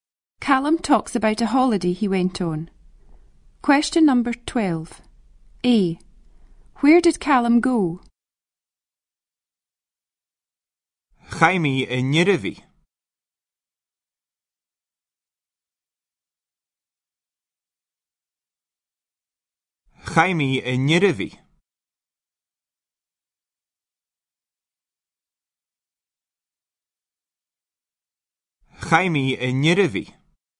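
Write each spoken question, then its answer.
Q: A. Where did Callum go?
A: Norway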